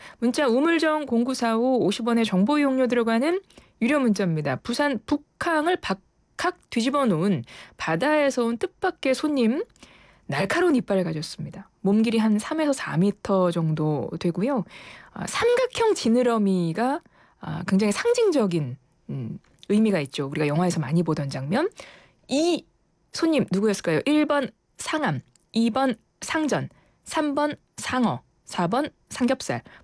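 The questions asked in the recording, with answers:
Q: 이 손님 누구였을까요?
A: 3: 상어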